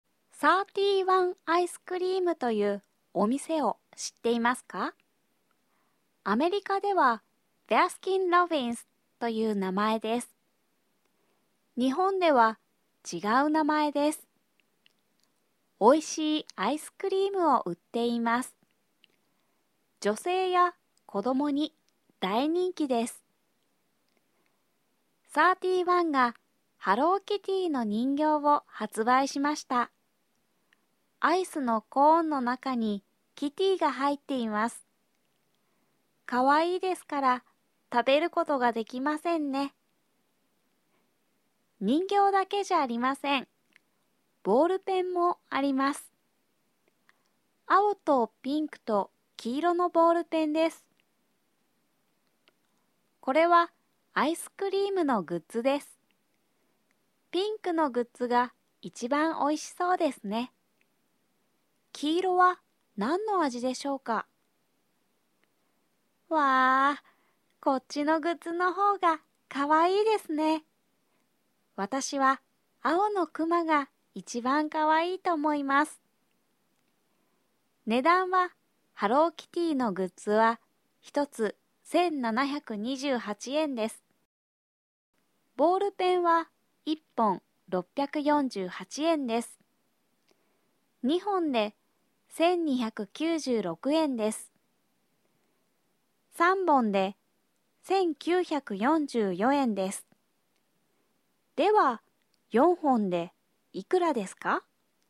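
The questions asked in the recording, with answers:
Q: では、4本でいくらですか?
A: 2592円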